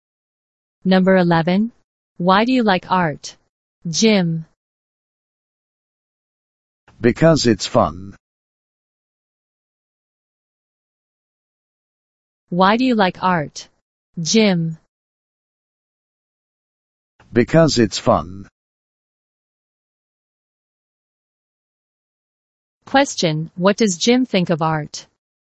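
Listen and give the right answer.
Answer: It's fun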